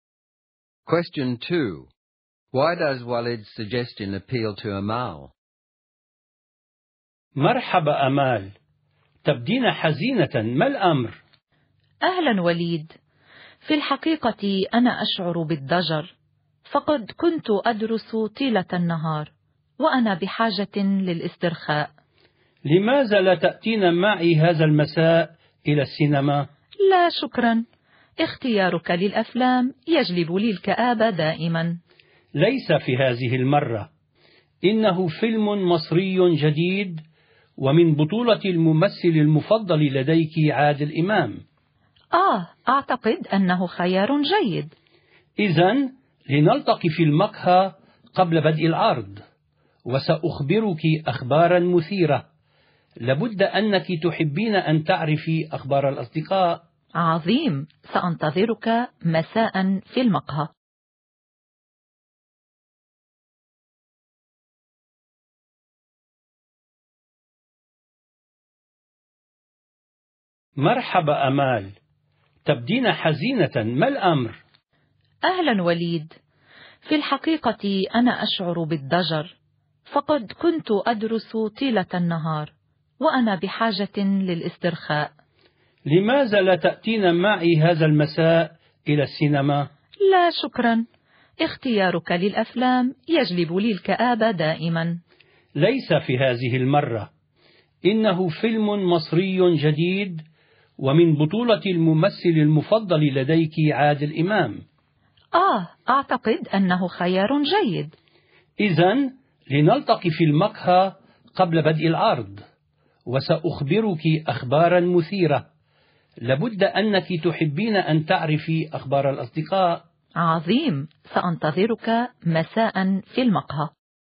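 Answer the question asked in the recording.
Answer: She is bored and needs to relax after studying all day; the film is a new Egyptian film starring her favourite actor Adel Imam, and she'll hear exciting news about friends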